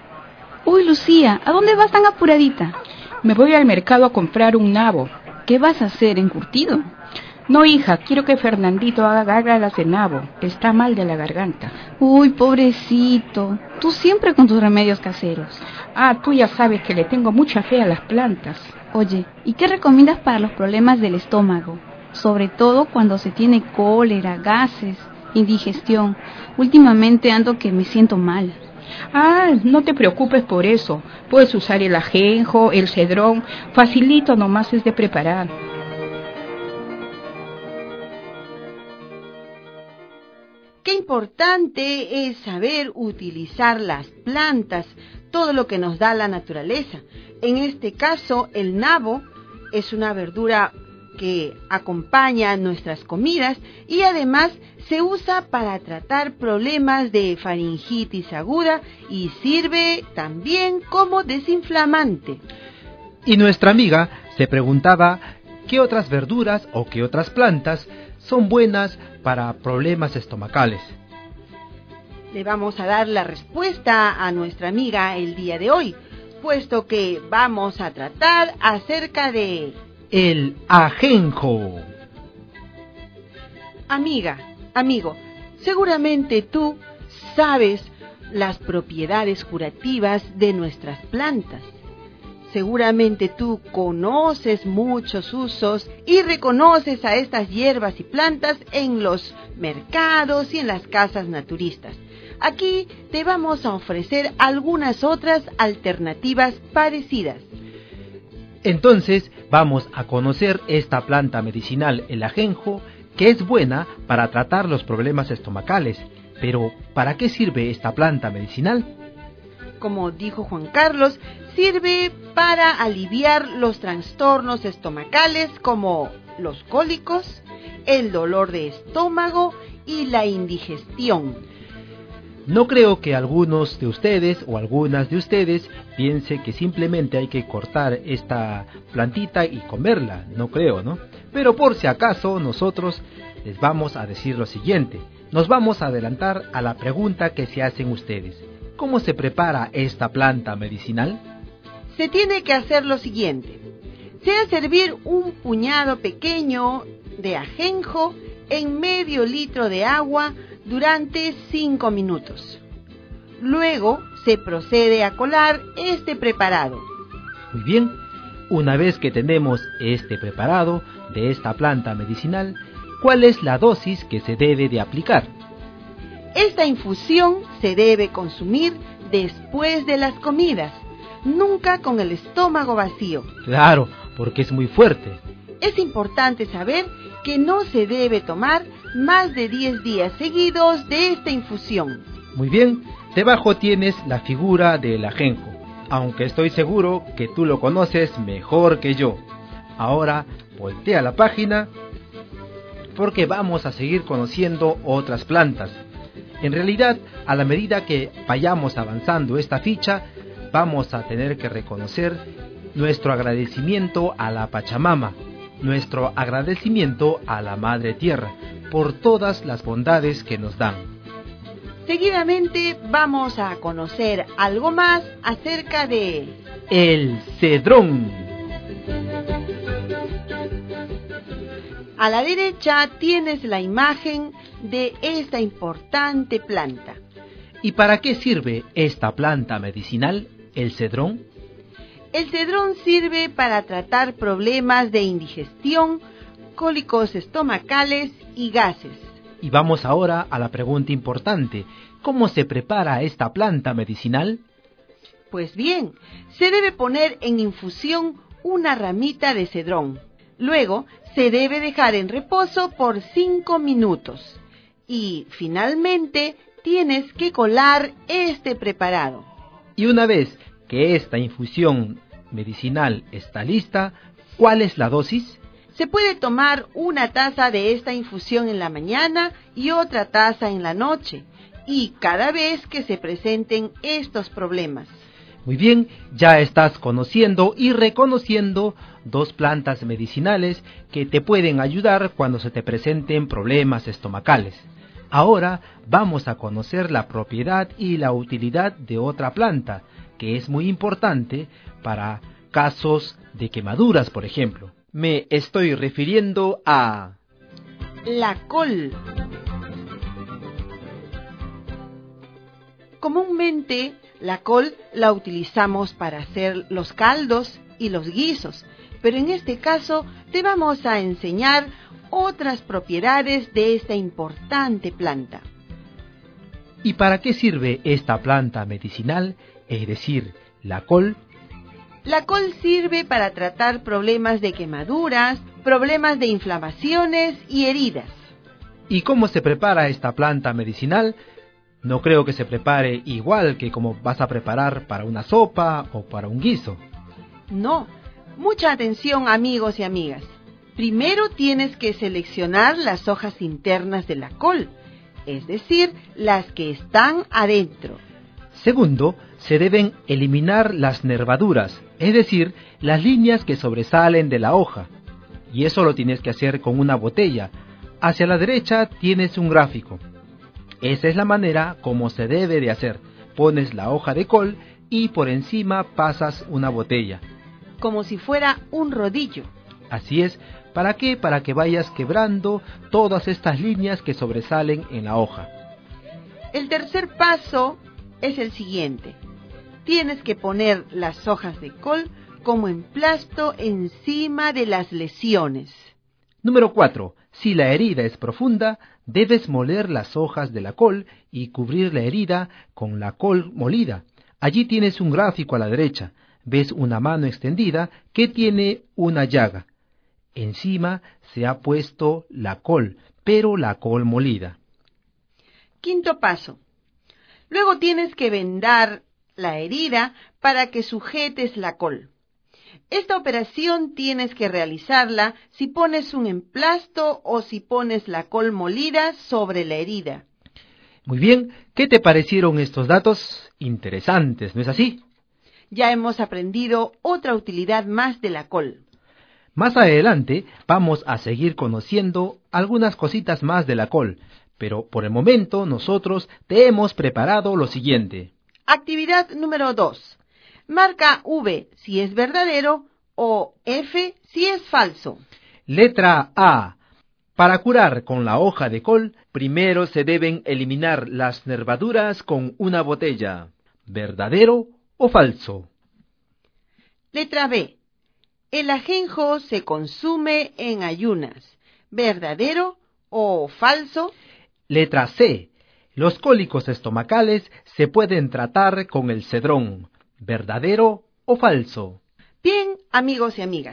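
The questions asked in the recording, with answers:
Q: Letra B. El ajenjo se consume en ayunas.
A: Falso

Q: Letra C. Los cólicos estomacales se pueden tratar con el cedrón.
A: Verdadero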